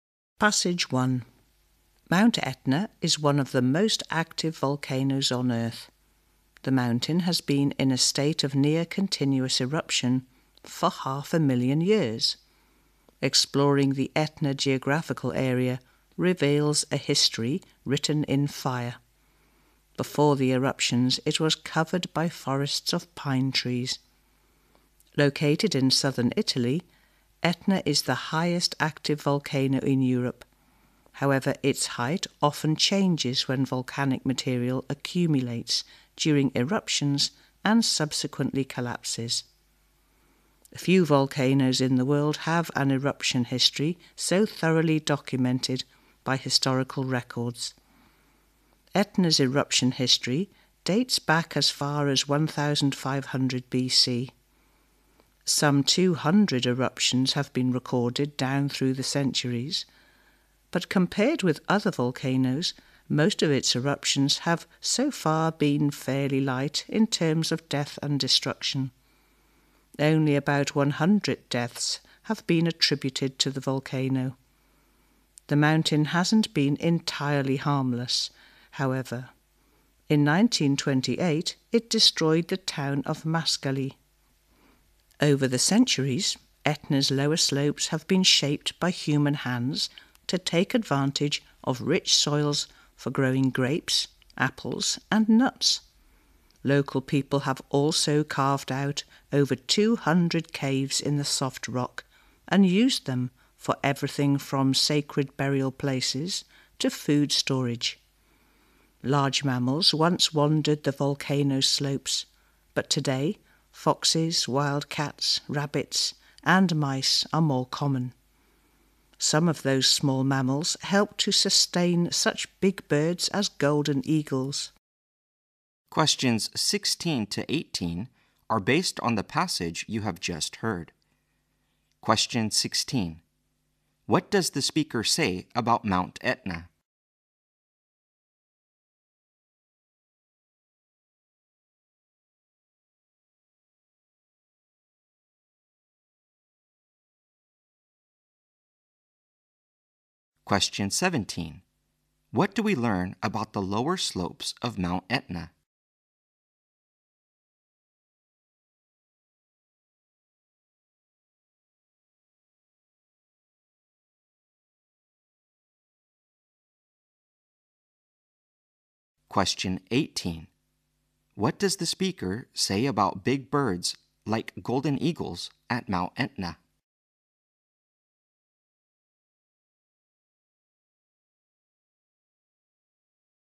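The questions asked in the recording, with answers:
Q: What do we learn about the lower slopes of Mount Etna?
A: They have been shaped by people to use the rich soils for growing grapes, apples and nuts

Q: What does the speaker say about big birds like golden eagles at Mount Etna?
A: They are sustained by small mammals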